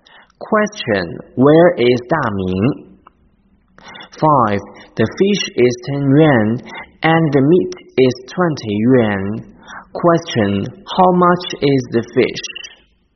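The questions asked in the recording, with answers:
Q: Question, how much is the fish?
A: 10 yuan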